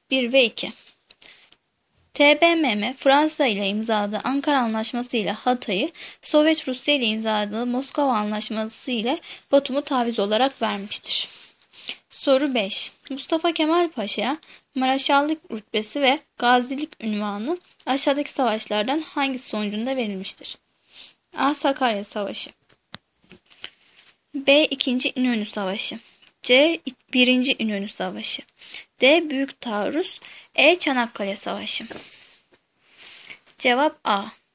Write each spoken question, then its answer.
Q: Mustafa Kemal Paşa'ya Mareşallık rütbesi ve Gazilik unvanı aşağıdaki savaşlardan hangisi sonucunda verilmiştir?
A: Cevap A.